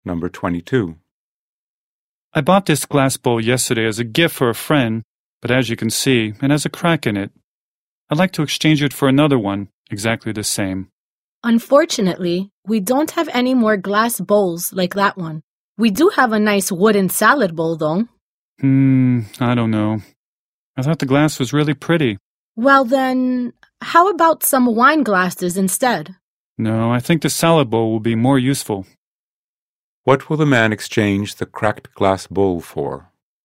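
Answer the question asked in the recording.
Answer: A wooden salad bowl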